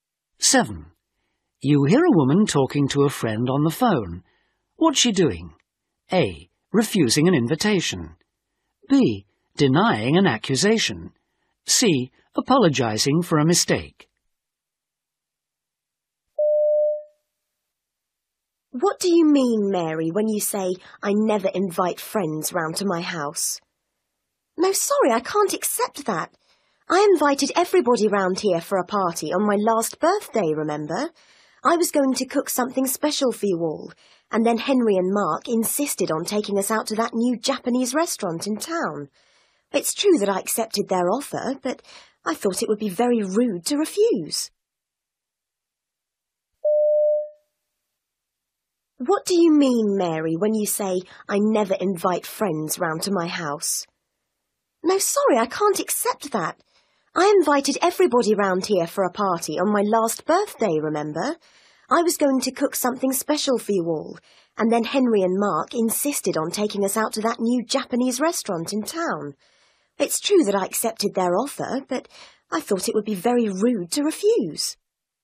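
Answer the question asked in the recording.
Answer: B: Denying an accusation.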